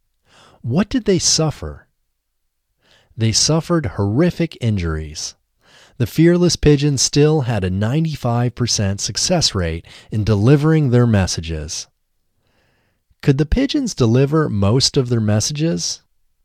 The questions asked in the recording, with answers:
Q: Could the pigeons deliver most of their messages?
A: Yes, the pigeons could deliver most of their messages.